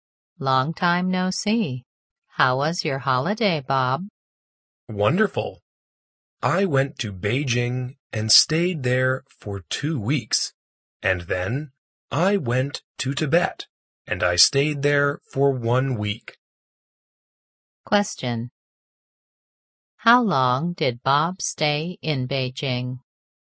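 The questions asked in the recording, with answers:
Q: How long did Bob stay in Beijing?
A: For 2 weeks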